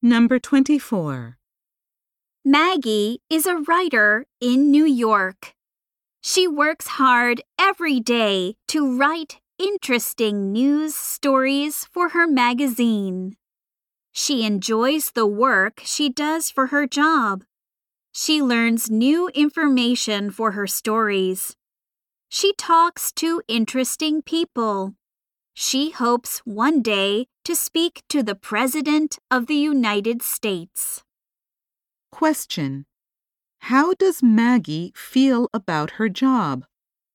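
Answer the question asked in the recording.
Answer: She enjoys it.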